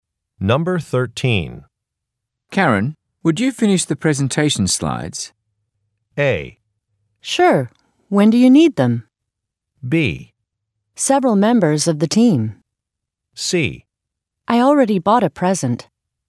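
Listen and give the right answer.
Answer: A: Sure. When do you need them?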